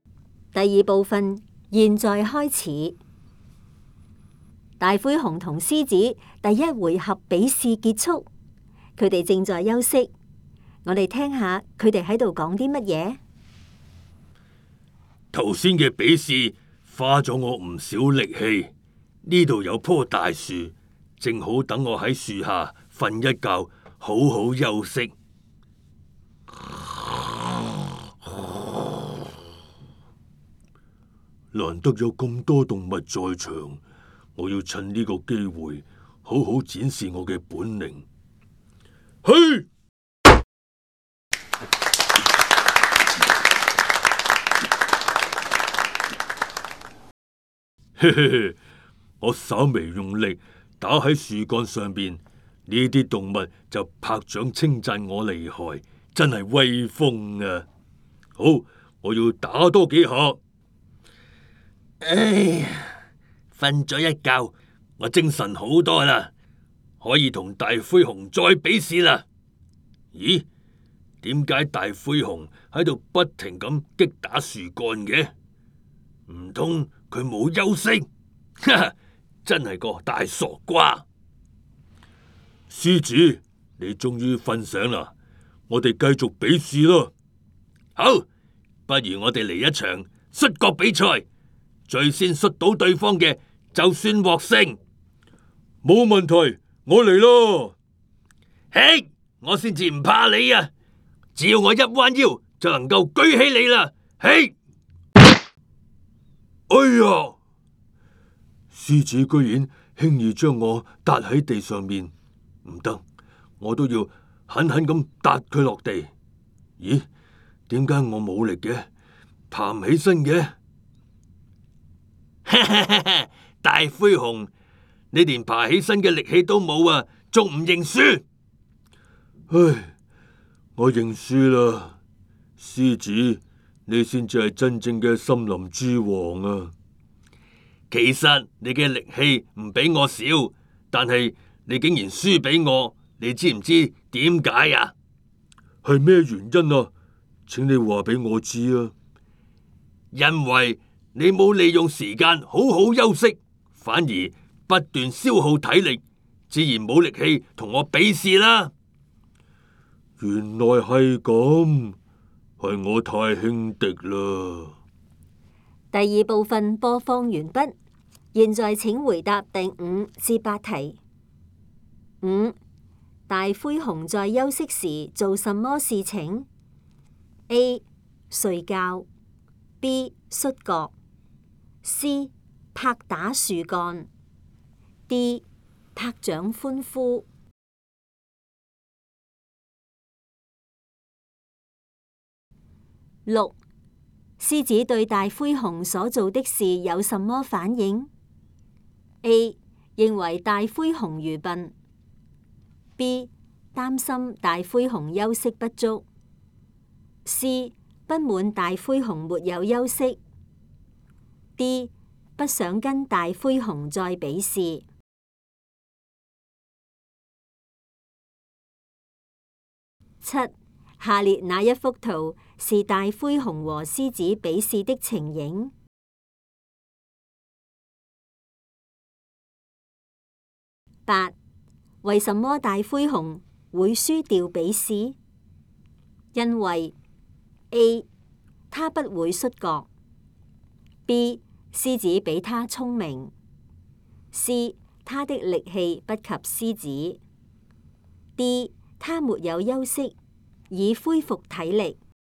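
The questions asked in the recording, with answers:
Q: 大灰熊在休息时做什么事情?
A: C: 拍打树干

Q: 狮子对大灰熊所做的事有什么反应?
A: A: 认为大灰熊愚笨

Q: 为什么大灰熊会输掉比试?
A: D: 他没有休息以恢复体力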